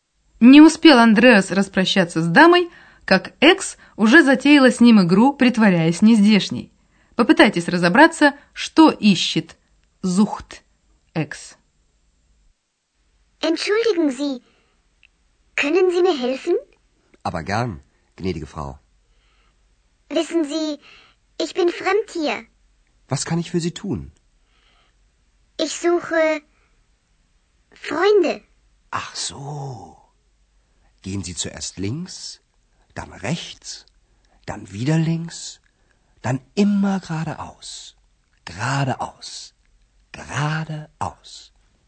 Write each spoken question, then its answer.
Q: Попытайтесь разобраться, что ищет Зухт.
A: Экс говорит, что ищет друзей.